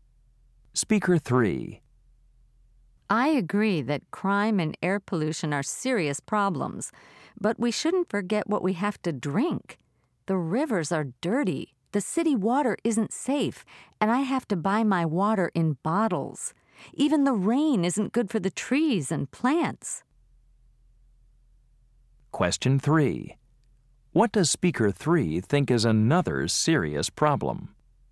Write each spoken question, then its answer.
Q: What does Speaker 3 think is another serious problem?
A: water pollution is a big problem too.